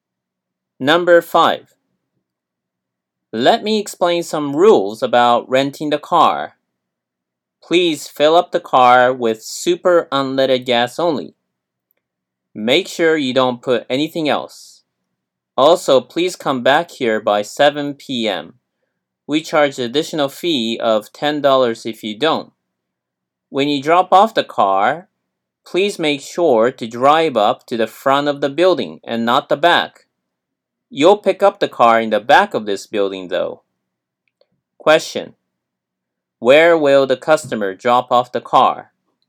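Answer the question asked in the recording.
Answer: At the front of the building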